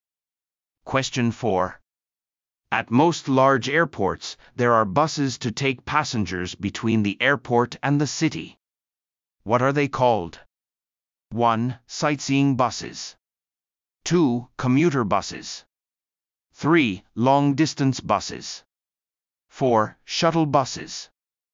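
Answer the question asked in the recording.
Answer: 4: Shuttle buses.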